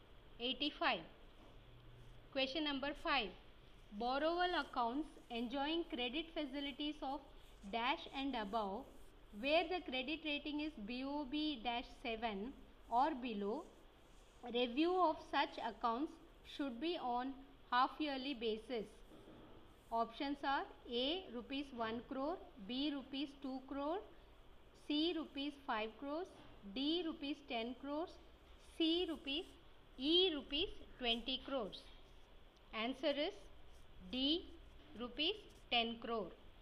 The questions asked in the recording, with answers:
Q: Borrowal accounts enjoying credit facilities of dash and above where the credit rating is BOB dash 7 or below review of such accounts should be on half yearly basis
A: answer is d rupees 10 crore.